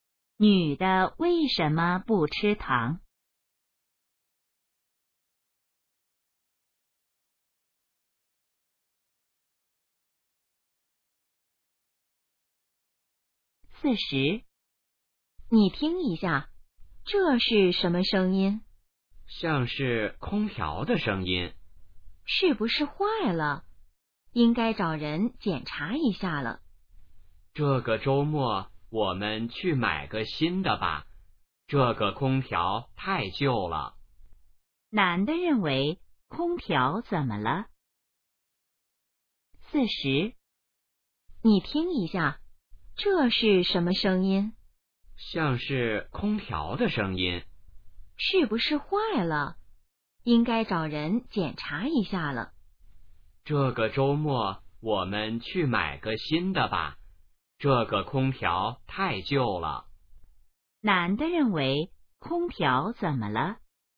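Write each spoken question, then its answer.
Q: 男的认为空调怎么了?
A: 太旧了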